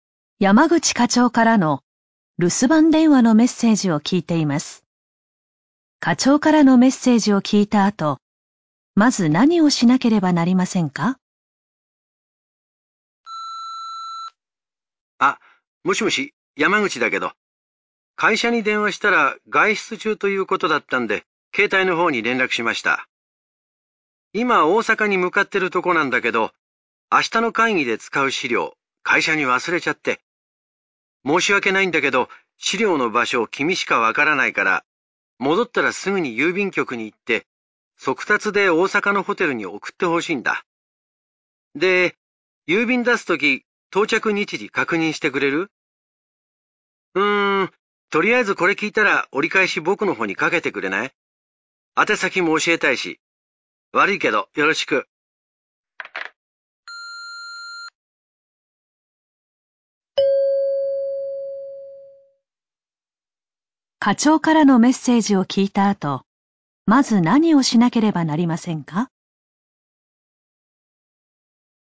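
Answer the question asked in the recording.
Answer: 課長に折り返し電話をかける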